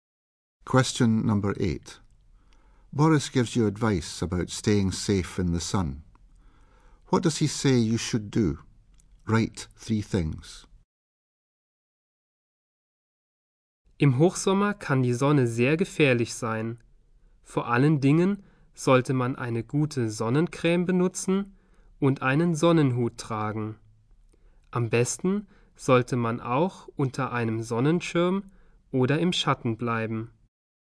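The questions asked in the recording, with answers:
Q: What does he say you should do?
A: Use good sun cream, wear a sun hat, stay under a sunshade or in the shade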